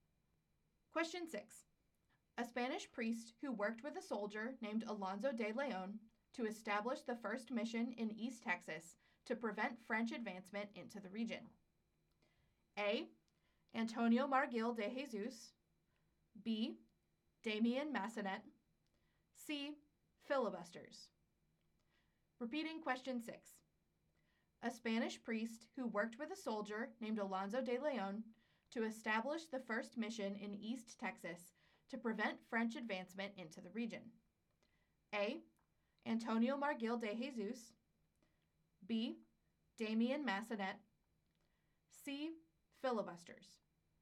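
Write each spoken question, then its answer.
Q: A Spanish priest who worked with a soldier named Alonso de León to establish the first mission in East Texas to prevent French advancement into the region.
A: B: Damien Massenet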